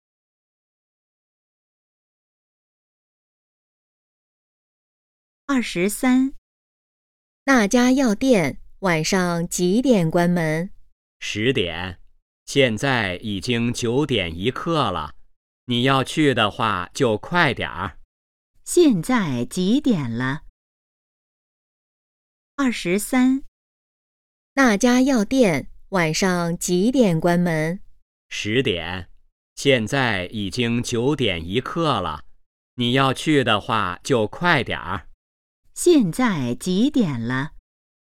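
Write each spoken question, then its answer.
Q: 现在几点了?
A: 九点一刻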